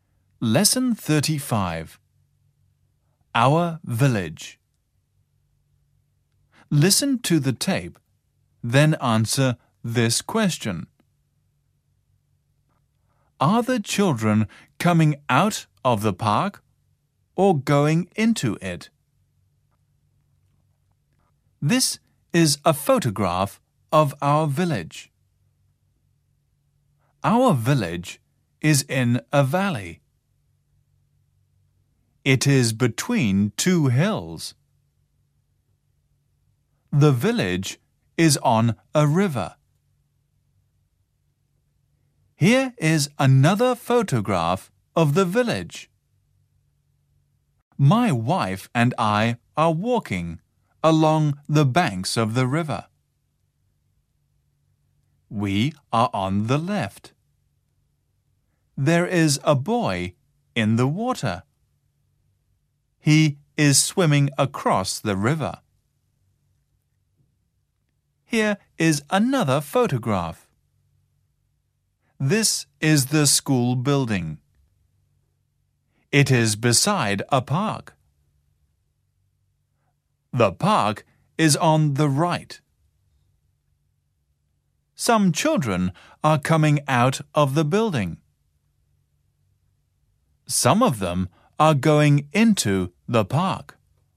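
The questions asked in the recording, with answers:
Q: Are the children coming out of the park or going into it?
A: They are going into it.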